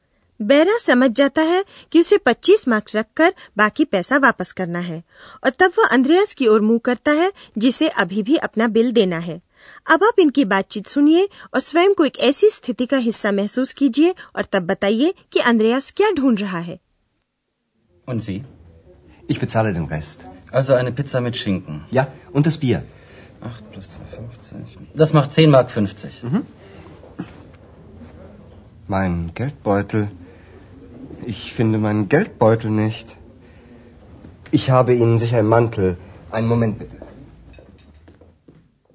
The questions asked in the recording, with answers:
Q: और तब बताइए कि अंद्रयास क्या ढूंढ रहा है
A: वह आमतौर पर एक बटुए गेल्ट बॉइडल में होता है और वही अंद्रयास को नहीं मिल रहा है